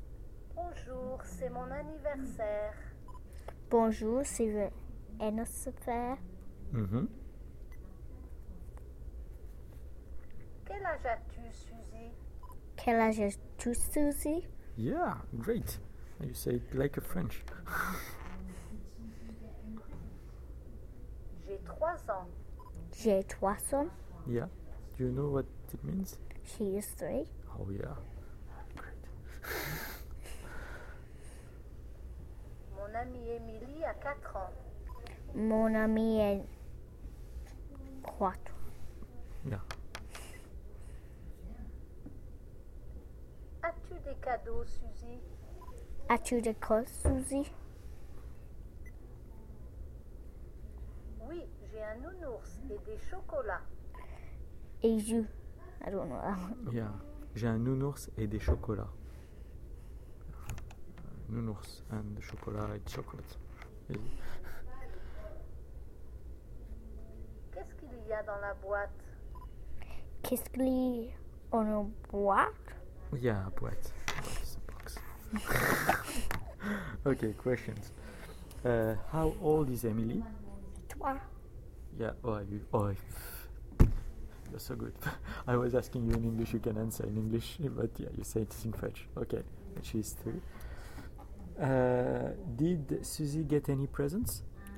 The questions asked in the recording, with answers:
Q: Did Suzy get any presents?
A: Yes.